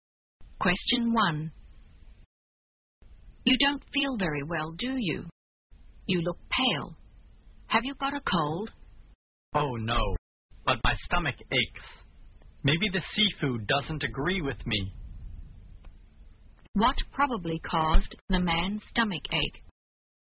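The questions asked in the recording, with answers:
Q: What probably caused the man's stomach ache?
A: The seafood he ate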